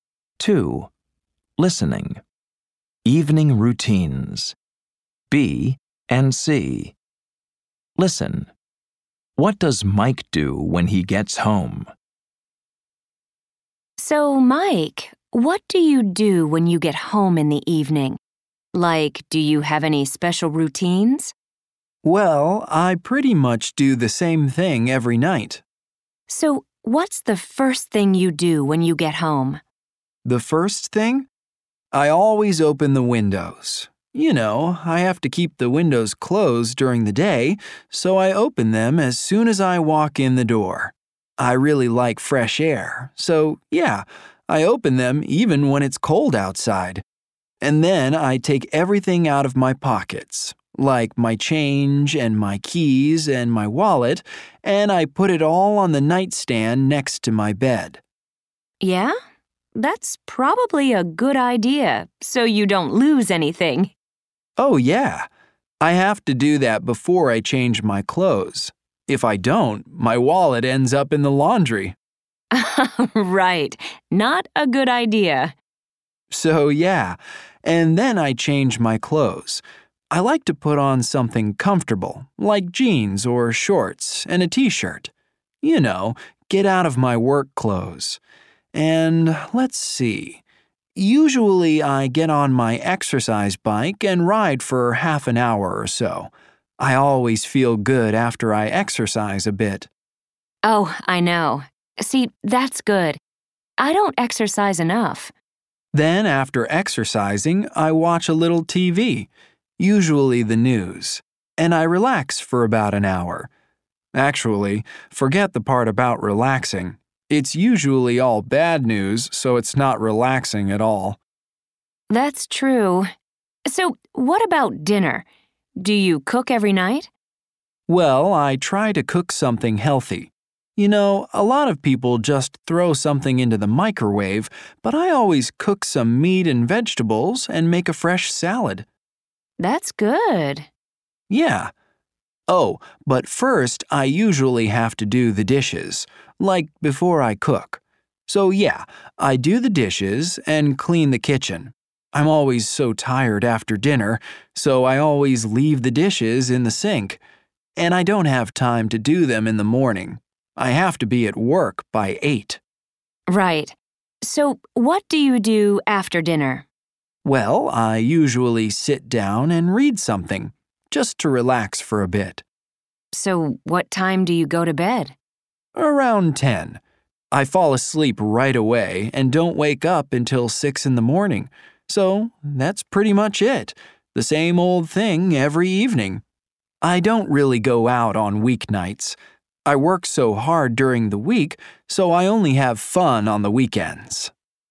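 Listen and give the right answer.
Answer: He opens the windows, empties his pockets, changes clothes, rides his exercise bike, watches TV, does the dishes, cooks dinner, reads, and goes to bed around 10.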